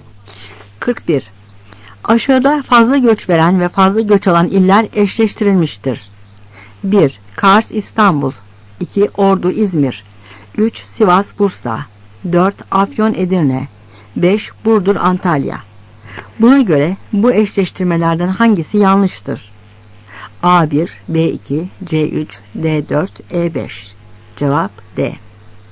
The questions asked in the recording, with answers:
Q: Buna göre bu eşleştirmelerden hangisi yanlıştır?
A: Cevap D.